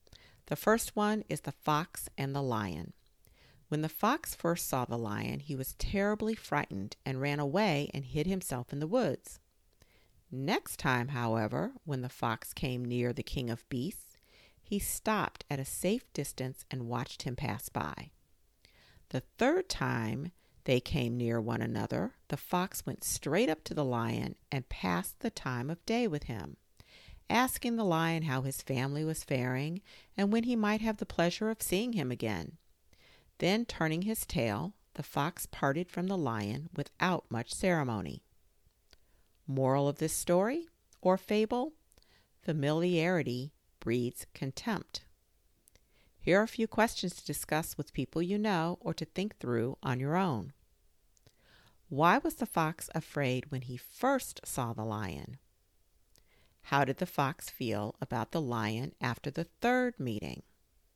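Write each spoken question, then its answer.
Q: How did the fox feel about the lion after the third meeting?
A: He was no longer afraid and showed little respect for him.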